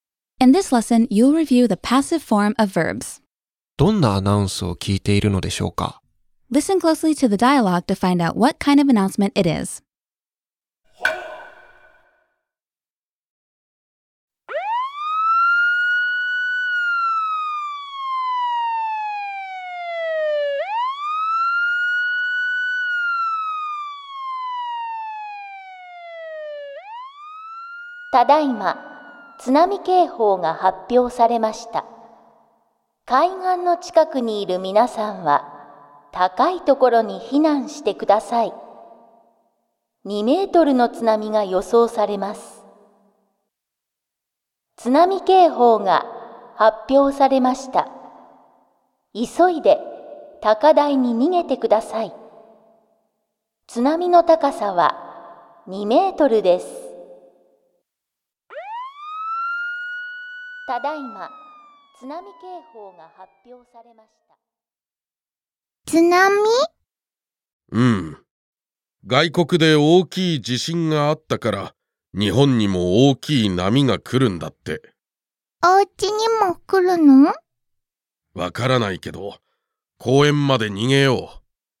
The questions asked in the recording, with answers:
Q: どんなアナウンスを聞いているのでしょうか?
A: 今回は津波のアナウンスでしたね。